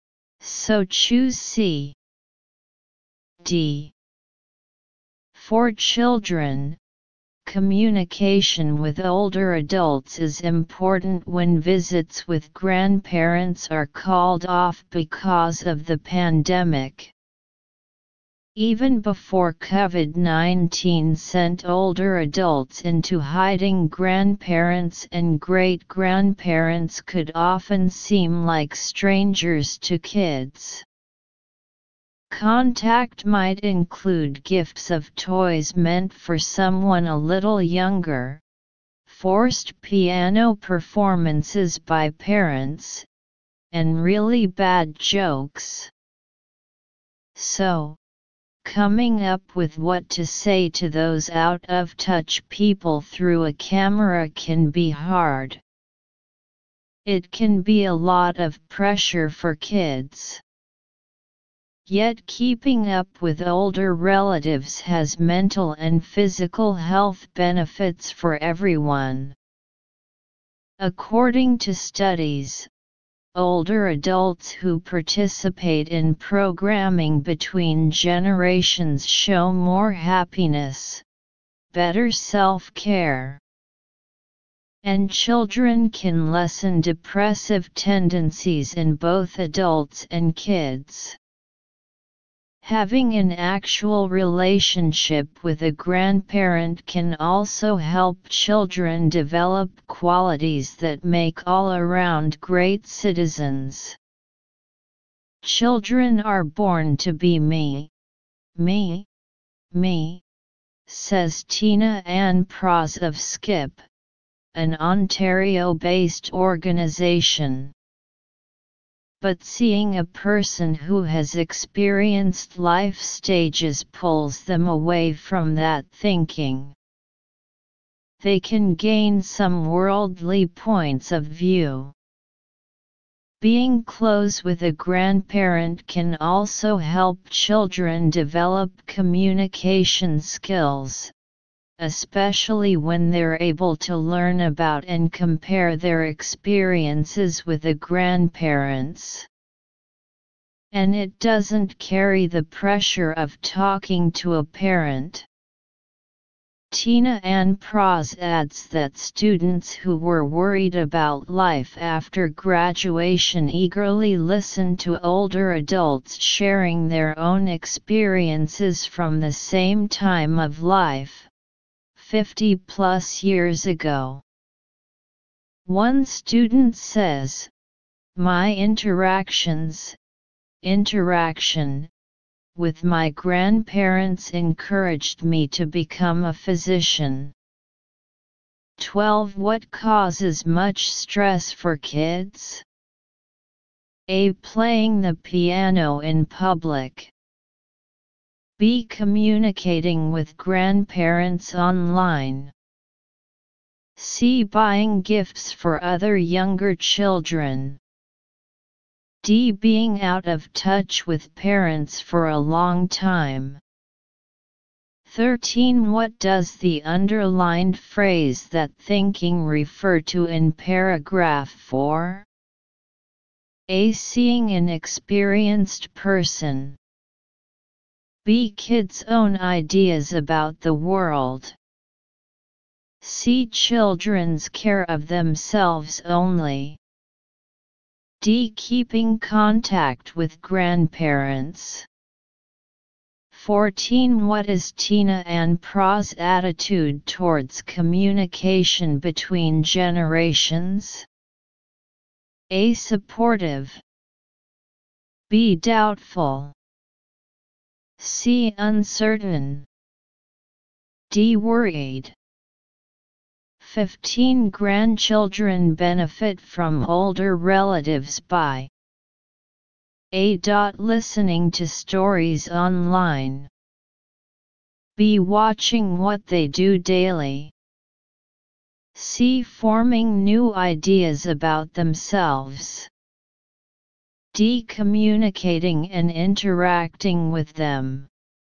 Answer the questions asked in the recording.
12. 12. B.
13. 13. C.
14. 14. A.
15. 15. D.